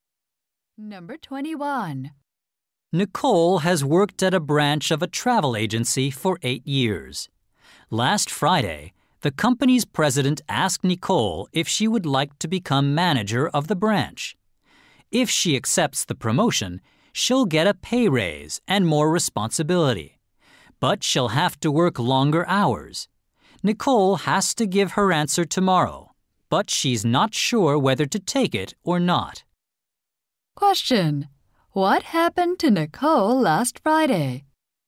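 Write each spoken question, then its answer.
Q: What happened to Nicole last Friday?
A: She was offered a promotion to branch manager.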